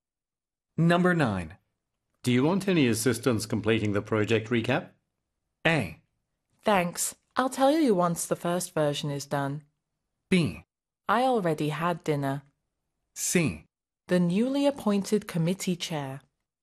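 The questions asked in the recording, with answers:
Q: Do you want any assistance completing the project recap?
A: A: Thanks. I'll tell you once the first version is done.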